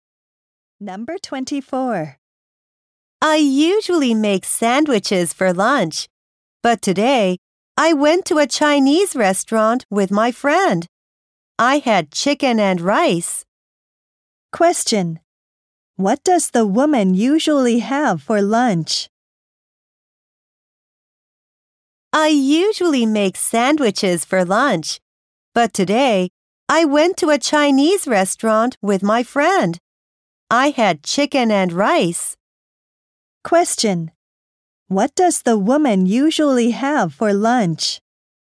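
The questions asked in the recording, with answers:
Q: What does the woman usually have for lunch?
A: Sandwiches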